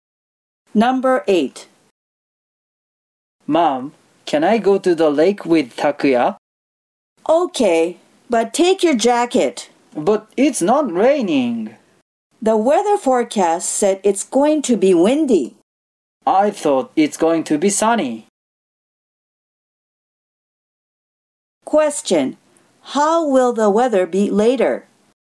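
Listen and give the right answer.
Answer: It will be windy.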